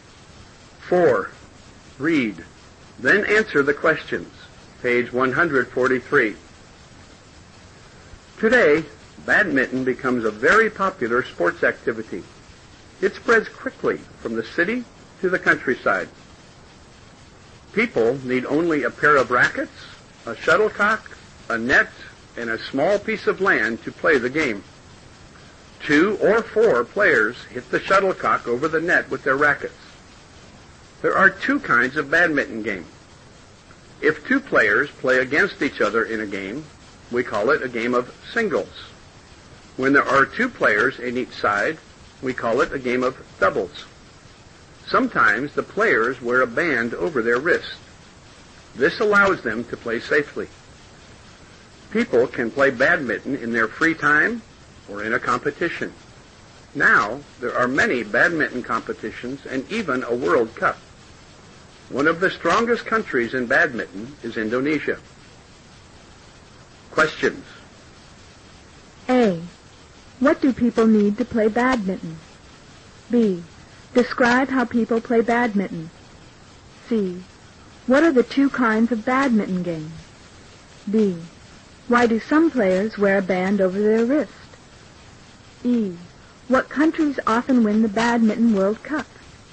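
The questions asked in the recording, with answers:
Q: What do people need to play badminton?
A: A pair of rackets, a shuttlecock, a net, and a small piece of land

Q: Describe how people play badminton.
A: Two or four players hit the shuttlecock over the net with their rackets

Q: What are the two kinds of badminton game?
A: Singles and doubles

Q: Why do some players wear a band over their wrist?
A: It allows them to play safely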